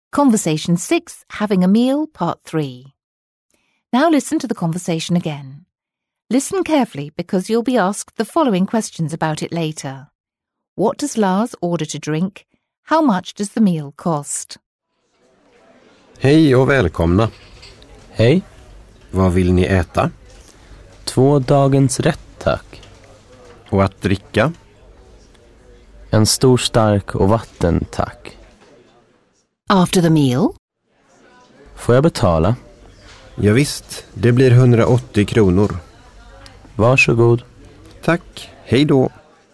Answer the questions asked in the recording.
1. Lars ordered a large lager and water.
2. 180 kroner